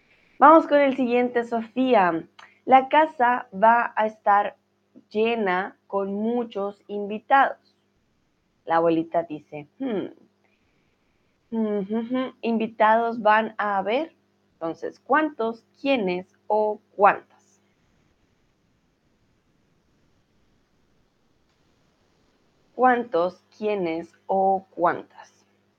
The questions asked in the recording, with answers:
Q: ¿Cuántos, quiénes o cuántas?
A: Entonces, ¿cuántos?